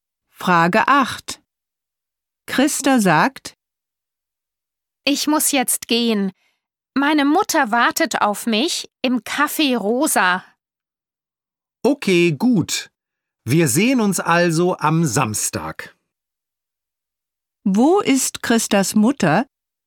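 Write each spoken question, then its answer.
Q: Wo ist Christas Mutter?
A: Im Café Rosa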